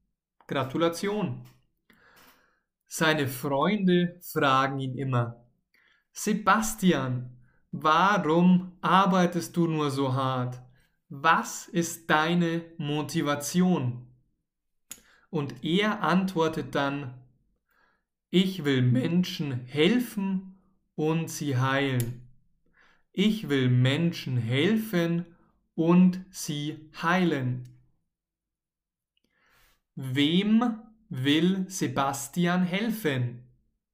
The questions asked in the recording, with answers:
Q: Wem will Sebastian helfen?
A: Menschen. Er will Menschen helfen.